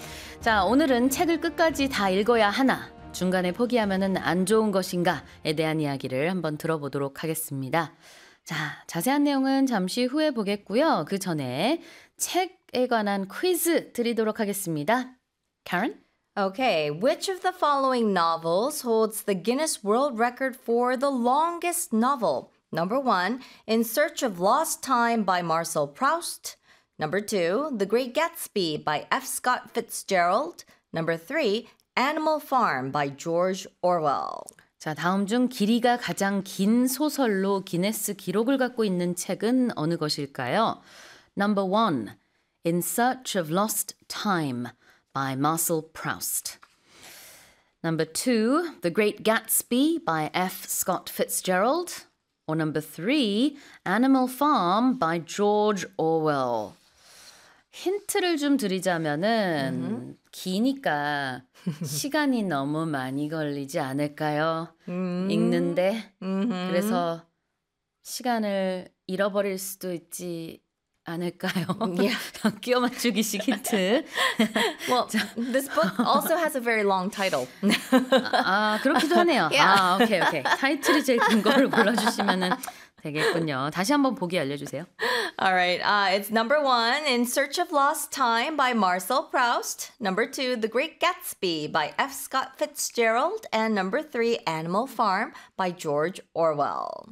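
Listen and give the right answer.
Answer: 1: In Search of Lost Time by Marcel Proust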